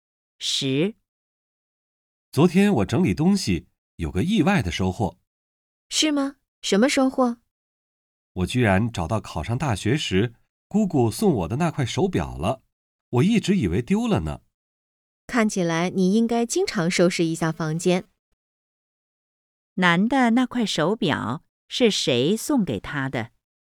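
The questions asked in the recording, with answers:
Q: 男的那块手表是谁送给他的?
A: 姑姑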